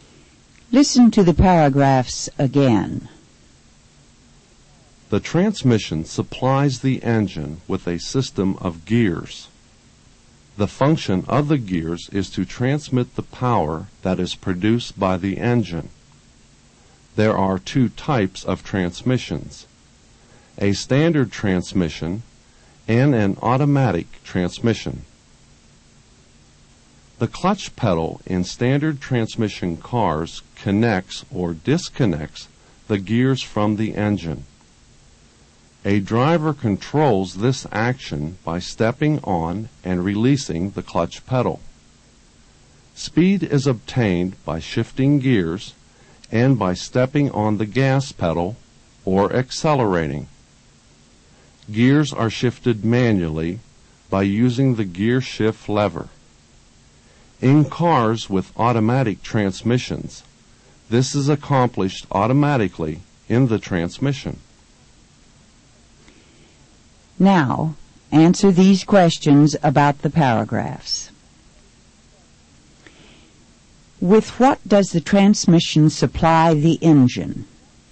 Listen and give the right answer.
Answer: It supplies the engine with a system of gears.